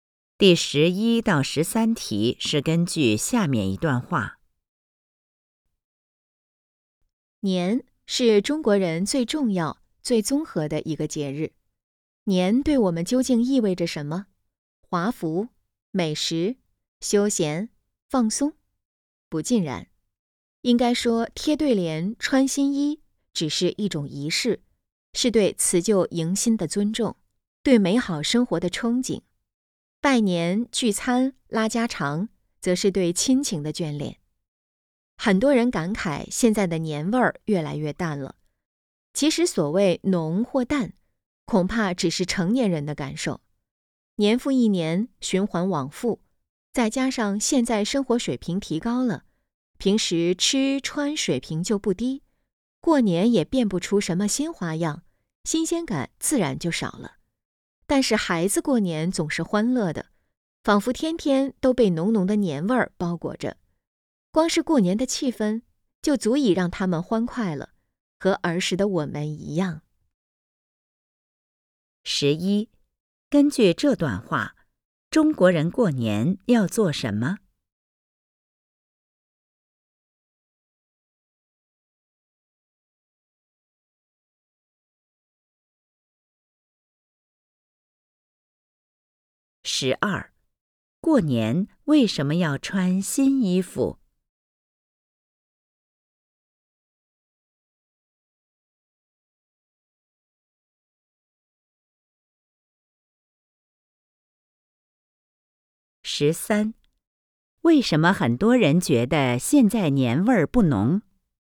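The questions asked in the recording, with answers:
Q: 根据这段话,中国人过年要做什么?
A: 贴对联、穿新衣、拜年、聚餐、拉家常

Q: 过年为什么要穿新衣服?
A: 是一种仪式,表示对辞旧迎新的尊重、对美好生活的憧憬

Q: 为什么很多人觉得现在年味儿不浓?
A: 年复一年,生活水平提高,过年变不出新花样,新鲜感少了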